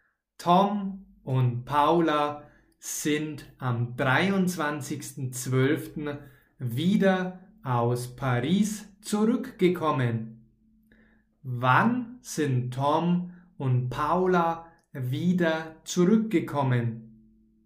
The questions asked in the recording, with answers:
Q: Wann sind Tom und Paula wieder zurückgekommen?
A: Am 23.12. Sie sind am 23.12.